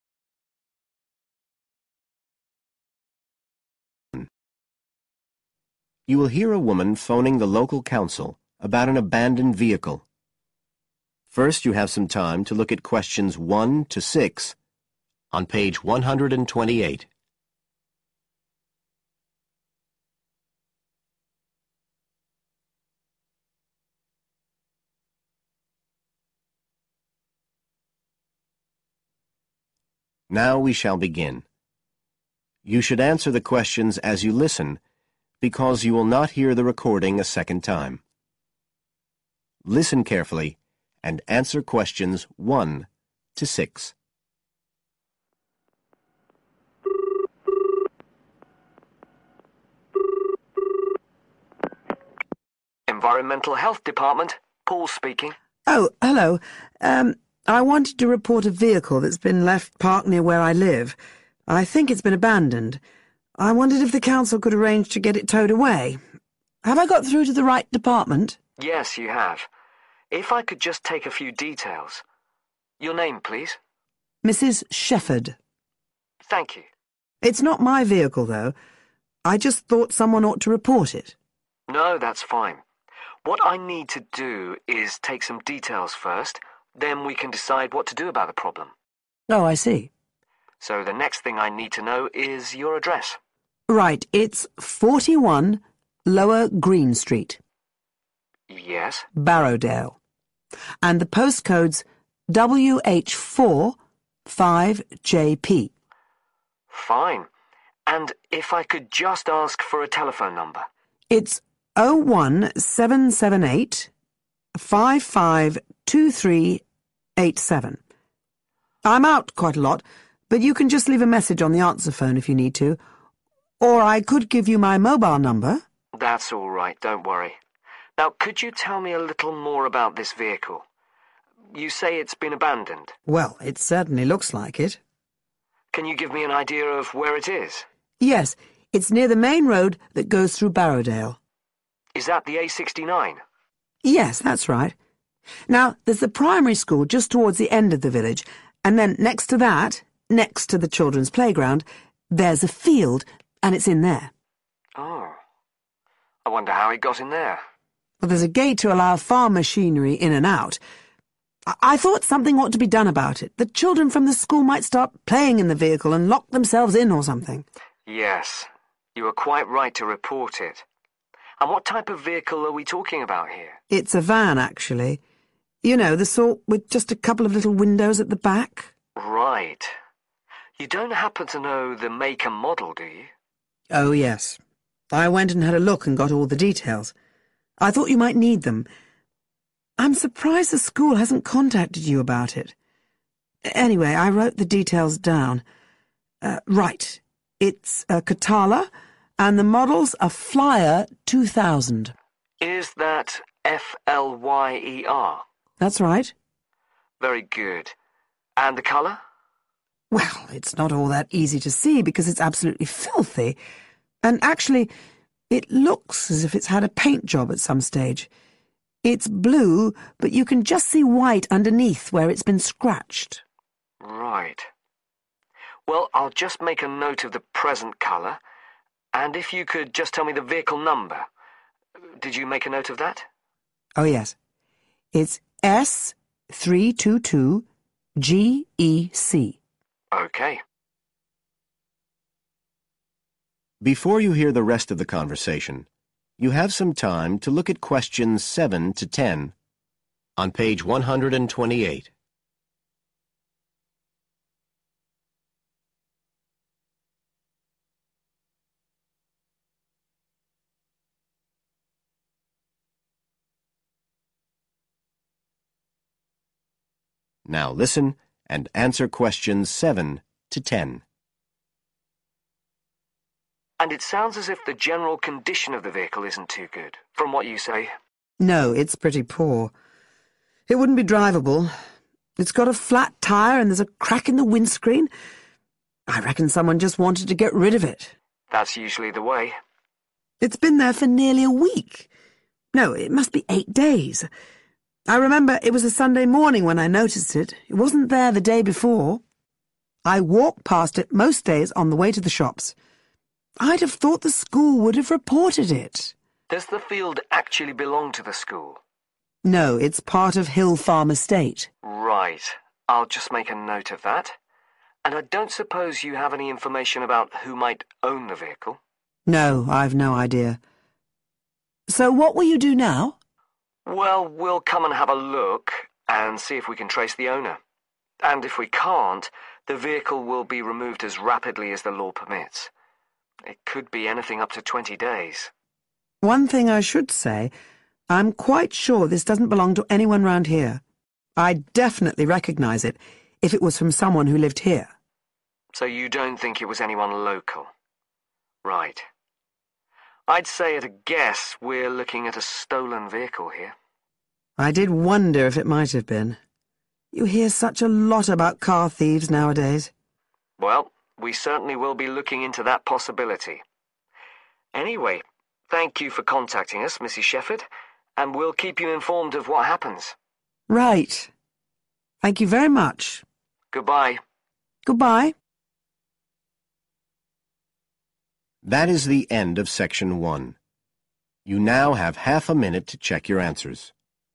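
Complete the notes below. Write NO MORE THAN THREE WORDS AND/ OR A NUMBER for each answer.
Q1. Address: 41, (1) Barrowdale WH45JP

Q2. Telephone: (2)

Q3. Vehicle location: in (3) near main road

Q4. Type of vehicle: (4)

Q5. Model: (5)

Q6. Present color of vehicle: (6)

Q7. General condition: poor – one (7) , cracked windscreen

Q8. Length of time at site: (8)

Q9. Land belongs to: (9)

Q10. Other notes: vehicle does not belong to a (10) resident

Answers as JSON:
{"1": "Lower Green Street", "2": "01778 552387", "3": "a field", "4": "van", "5": "Flyer 2000", "6": "blue", "7": "flat tyre", "8": "8 days", "9": "Hill Farm Estate", "10": "local"}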